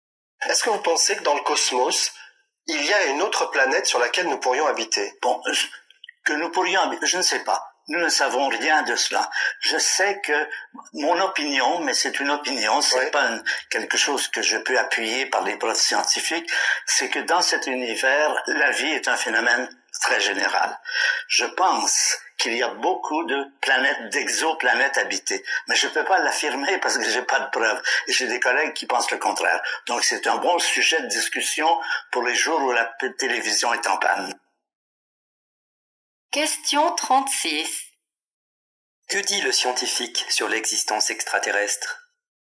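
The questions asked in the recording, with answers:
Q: Que dit le scientifique sur l'existence extraterrestre?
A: Il pense que la vie est très répandue dans l'univers, mais il n'a pas de preuves.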